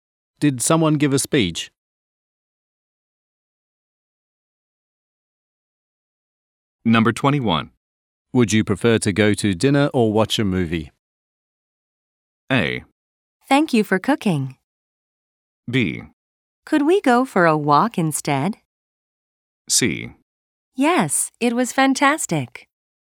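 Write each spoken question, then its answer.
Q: Would you prefer to go to dinner or watch a movie?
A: B: Could we go for a walk instead?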